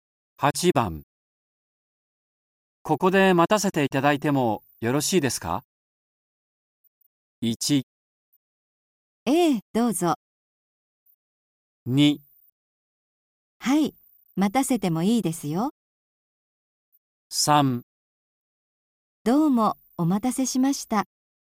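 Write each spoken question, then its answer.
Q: ここで待たせていただいてもよろしいですか?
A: 1: ええ、どうぞ。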